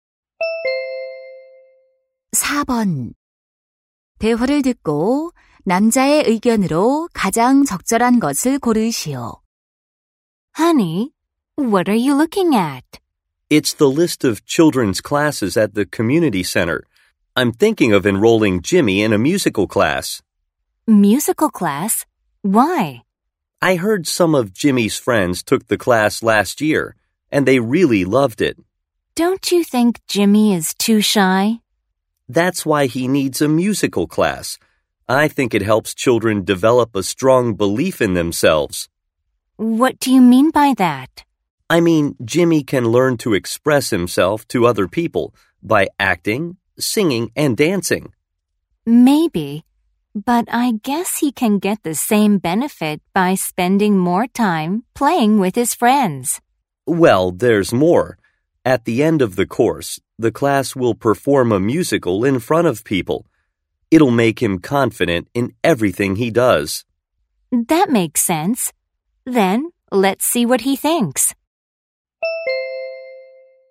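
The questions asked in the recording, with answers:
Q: 대화를 듣고 남자의 의견으로 가장 적절한 것을 고르시오.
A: 뮤지컬 수업은 아이의 자신감을 키우는 데 도움이 된다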